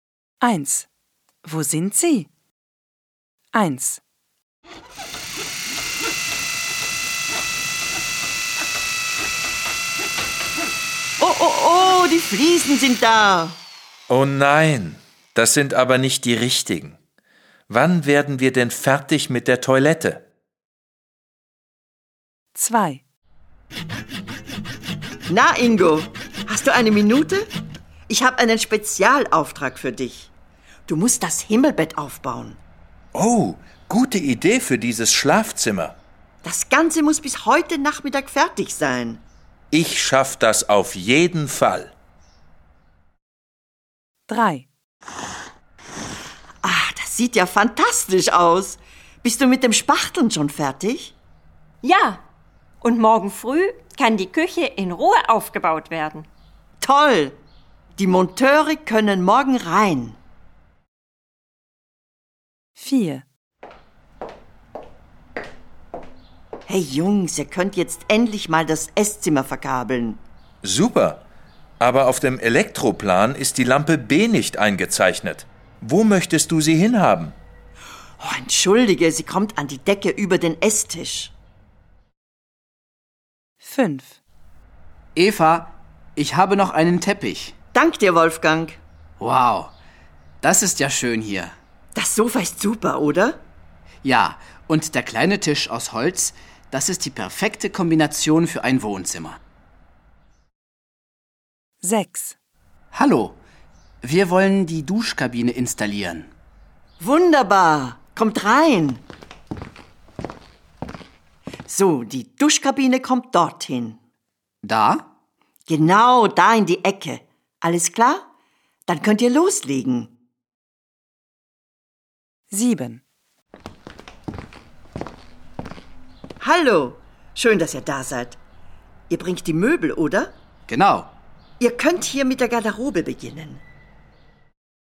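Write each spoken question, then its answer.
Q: Wo sind Sie?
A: In der Toilette (im Bad)

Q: Wo sind Sie?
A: Im Schlafzimmer

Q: Wo sind Sie?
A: In der Küche

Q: Wo sind Sie?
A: Im Esszimmer

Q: Wo sind Sie?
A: Im Wohnzimmer

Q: Wo sind Sie?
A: Im Badezimmer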